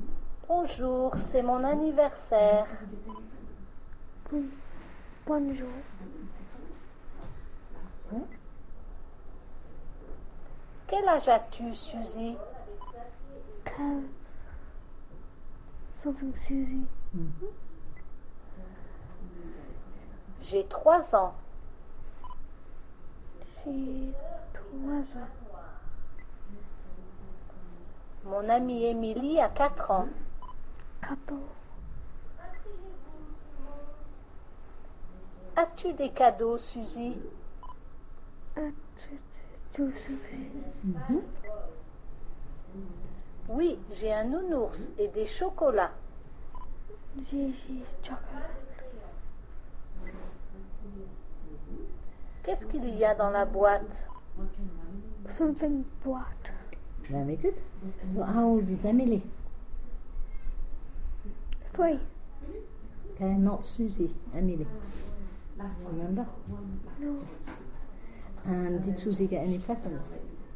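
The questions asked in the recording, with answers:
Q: And did Susie get any presents?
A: Yes, a teddy bear and chocolates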